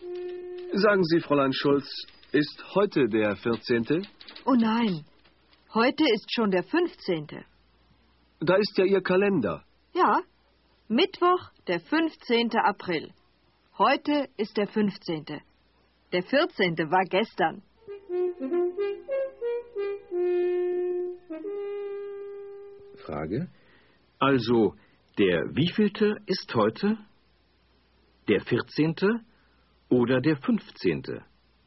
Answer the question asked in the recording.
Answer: Heute ist der 15.